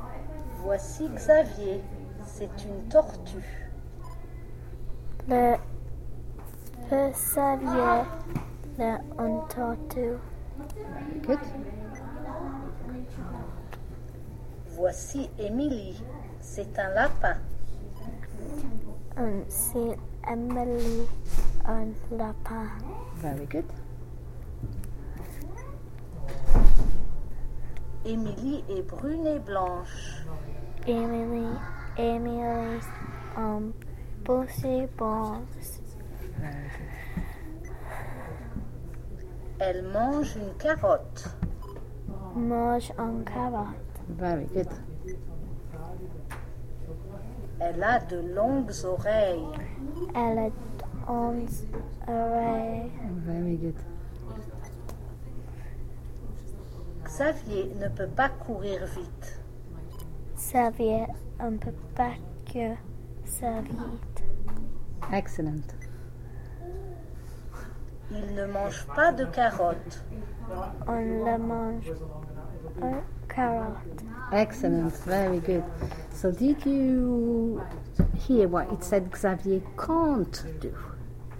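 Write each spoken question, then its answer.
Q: So did you hear what it said Xavier can't do?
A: Run fast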